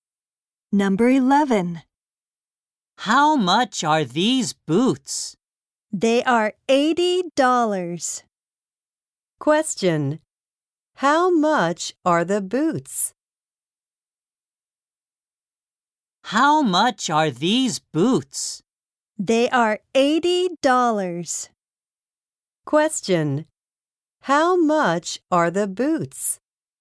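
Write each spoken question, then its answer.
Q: How much are the boots?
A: $80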